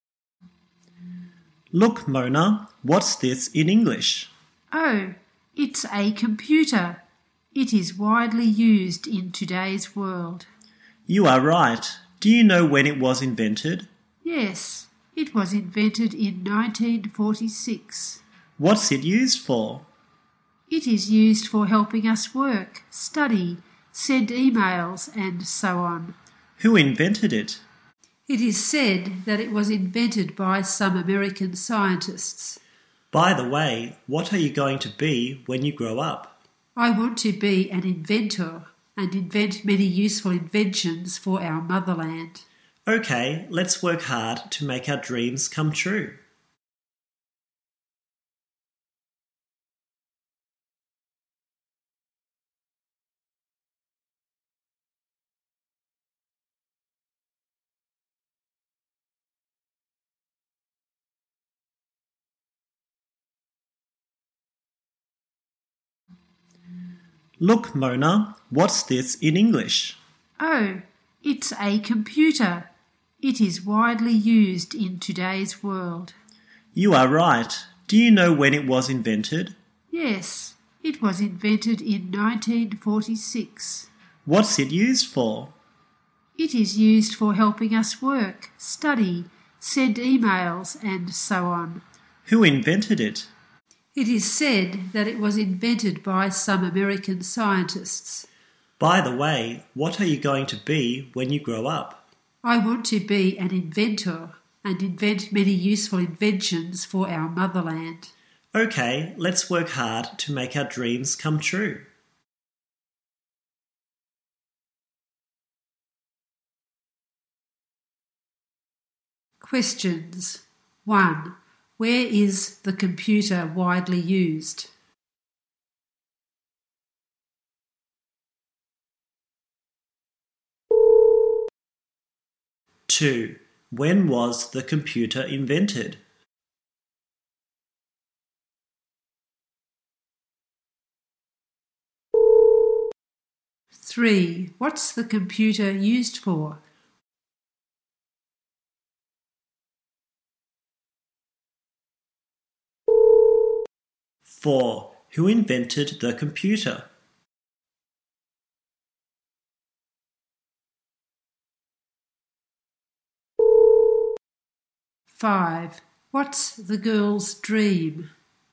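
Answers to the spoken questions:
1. In today's world
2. In 1946
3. Helping us work, study, send emails
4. Some American scientists
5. To be an inventor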